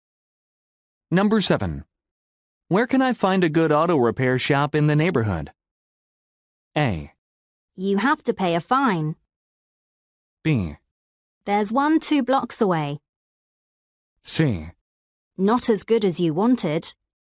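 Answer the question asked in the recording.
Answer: B: There's one 2 blocks away.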